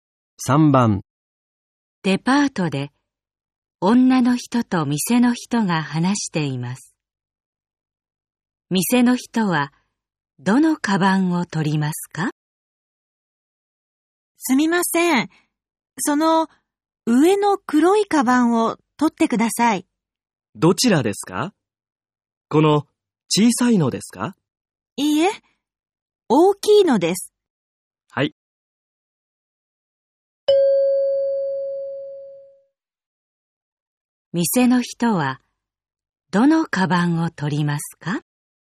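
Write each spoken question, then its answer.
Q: 店の人は、どのカバンを取りますか?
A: 上の大きい黒いカバン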